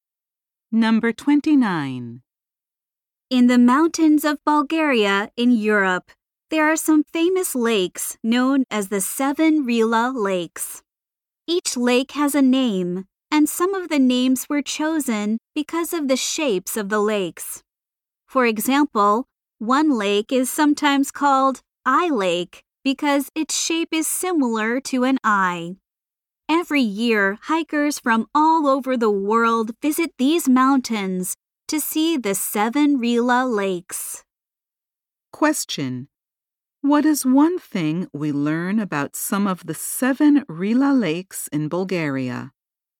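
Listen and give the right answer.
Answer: Some were named because of their shapes.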